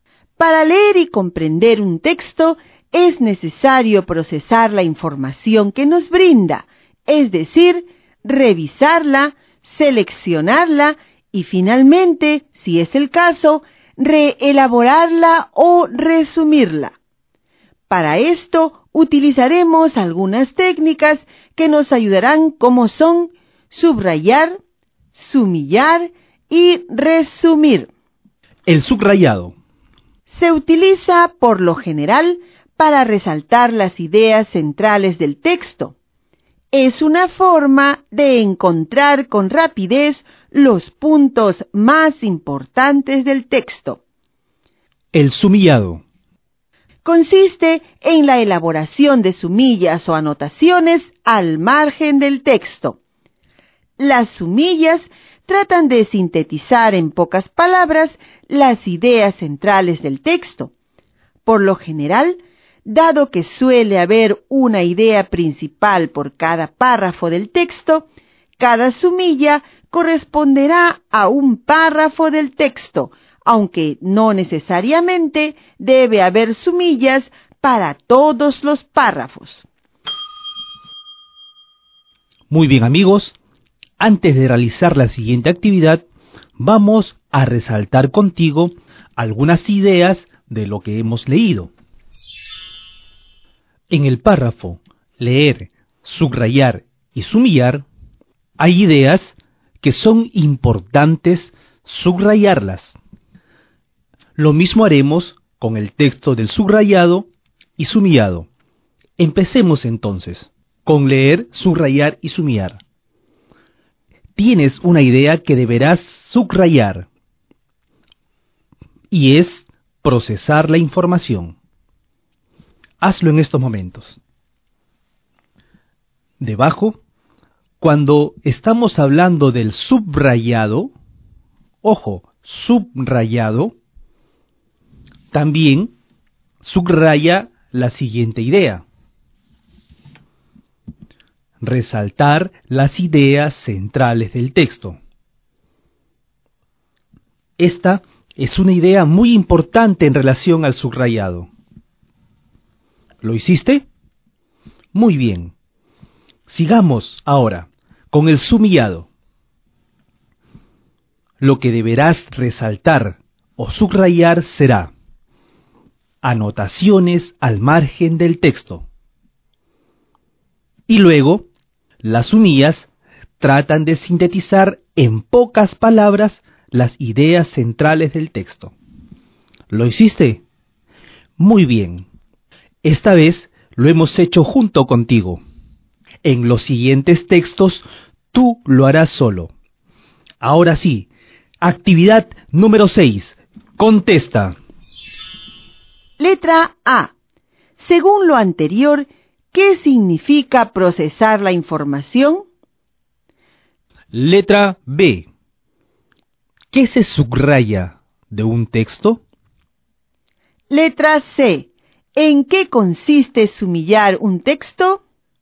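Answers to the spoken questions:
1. Revisarla, seleccionarla y, si es el caso, reelaborarla o resumirla
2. Las ideas centrales del texto
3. En elaborar anotaciones al margen del texto que sintetizan las ideas centrales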